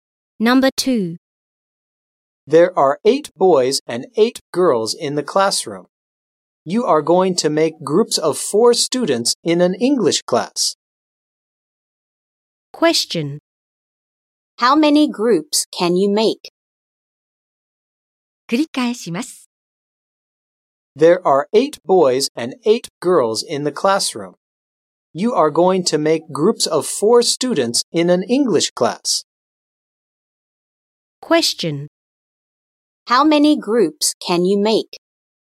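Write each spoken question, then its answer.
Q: How many groups can you make?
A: Four groups.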